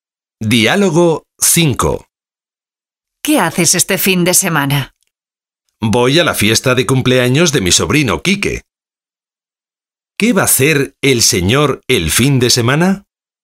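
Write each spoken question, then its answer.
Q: ¿Qué va a hacer el señor el fin de semana?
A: Ir a la fiesta de cumpleaños de su sobrino Quique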